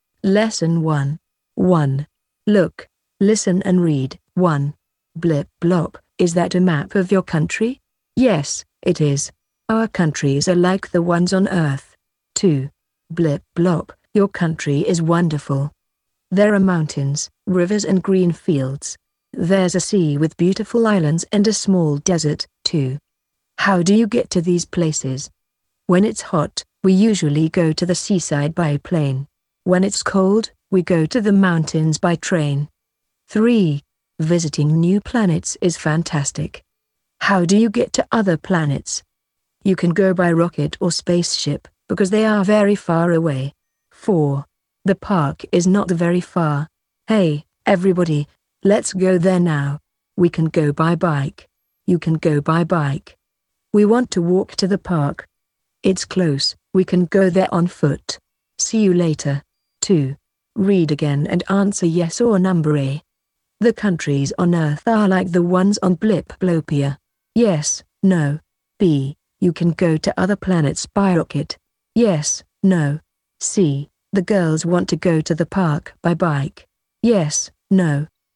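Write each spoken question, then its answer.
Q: The countries on Earth are like the ones on Blip Blopia.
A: Yes

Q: You can go to other planets by rocket.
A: Yes

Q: The girls want to go to the park by bike.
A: No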